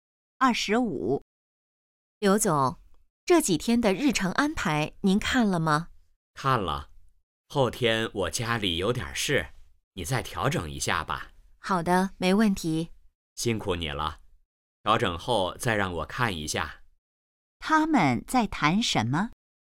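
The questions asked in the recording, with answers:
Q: 他们在谈什么?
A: 日程安排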